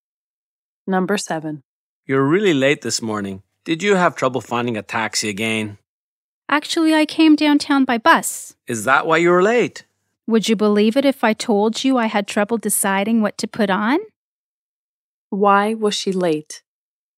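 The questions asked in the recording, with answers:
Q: Why was she late?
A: She had trouble deciding what to wear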